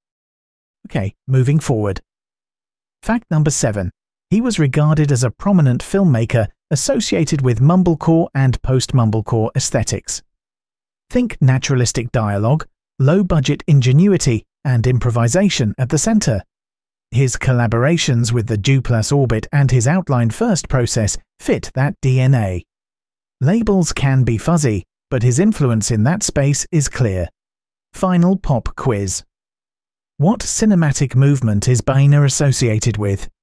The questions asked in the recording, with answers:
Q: What cinematic movement is Boehner associated with?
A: Correct answer, mumblecore.